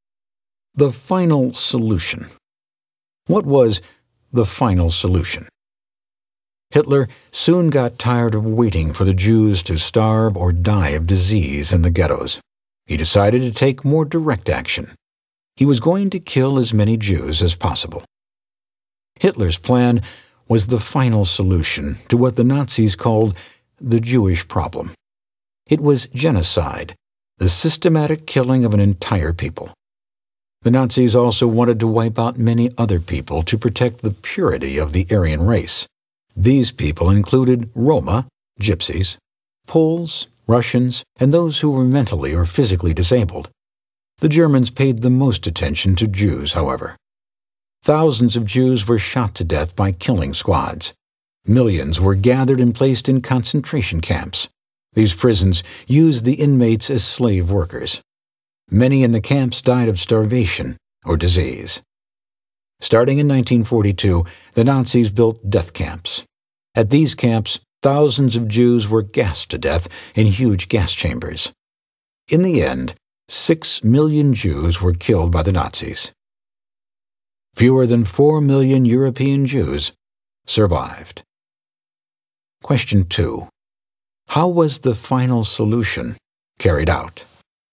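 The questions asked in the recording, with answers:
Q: How was the final solution carried out?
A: Jews were shot by killing squads, sent to concentration camps as slave labor, and gassed in death camps built from 1942.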